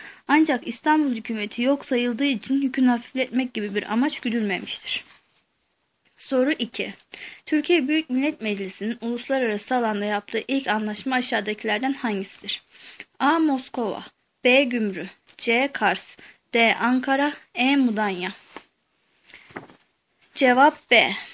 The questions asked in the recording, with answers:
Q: Türkiye Büyük Millet Meclisi'nin uluslararası alanda yaptığı ilk anlaşma aşağıdakilerden hangisidir?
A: Cevap B.